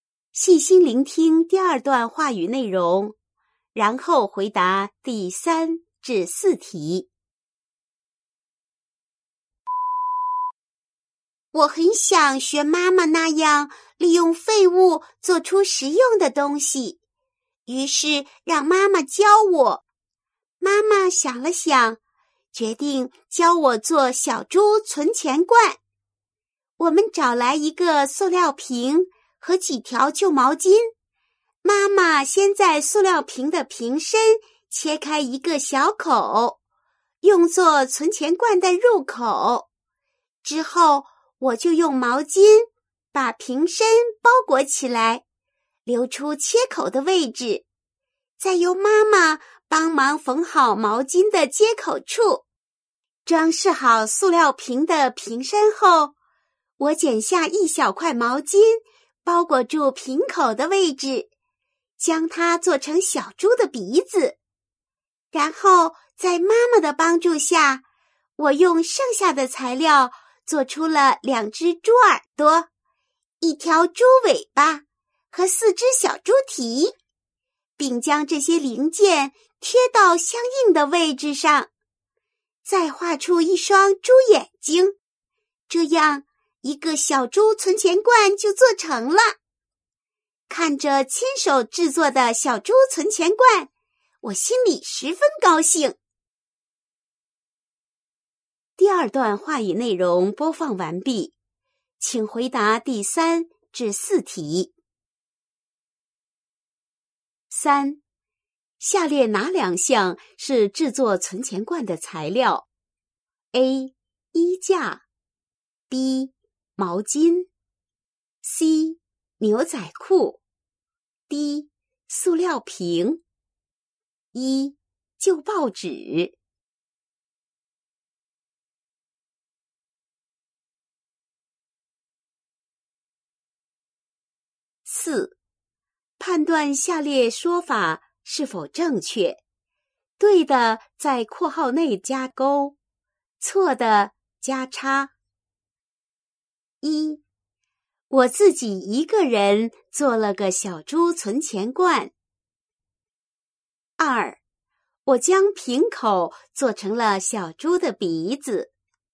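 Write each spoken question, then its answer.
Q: 下列哪两项是制作存钱罐的材料 ?A. 衣架 ,B. 毛巾 ,C. 牛仔裤 ,D. 塑料瓶。一,旧报纸。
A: B: 毛巾;D: 塑料瓶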